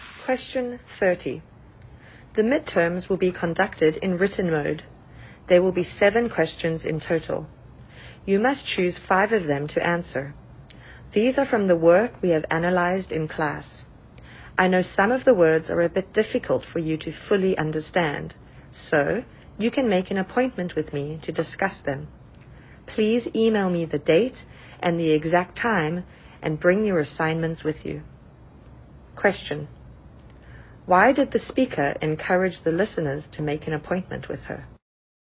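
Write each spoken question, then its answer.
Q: Why did the speaker encourage the listeners to make an appointment with her?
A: To discuss words they find difficult to understand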